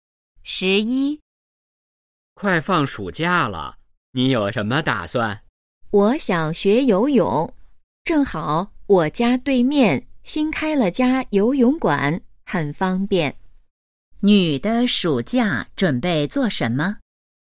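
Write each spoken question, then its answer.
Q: 女的暑假准备做什么?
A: 学游泳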